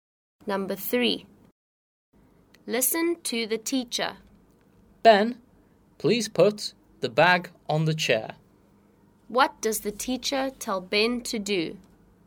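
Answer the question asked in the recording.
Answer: Put the bag on the chair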